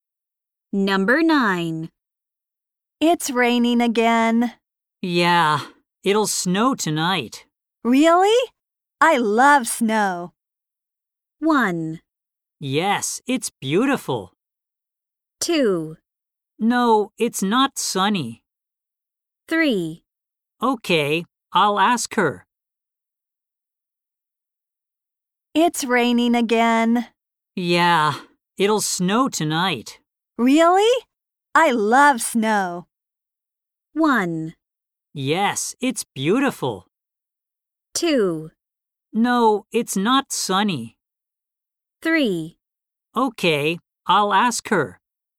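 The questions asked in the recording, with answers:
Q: Really? I love snow.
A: 1: Yes, it's beautiful.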